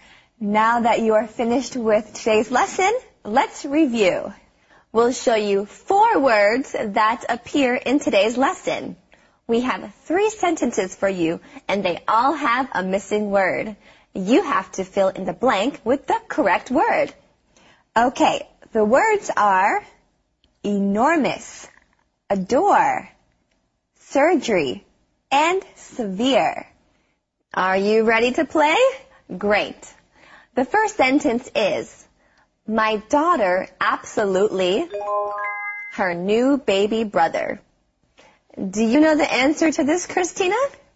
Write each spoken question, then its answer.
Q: The first sentence is, my daughter absolutely her new baby brother.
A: My daughter absolutely adores her new baby brother.